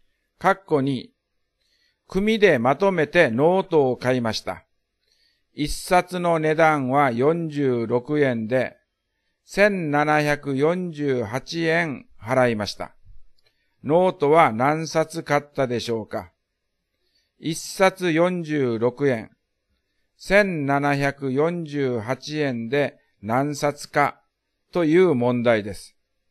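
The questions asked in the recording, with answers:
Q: ノートは何冊買ったでしょうか?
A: 38冊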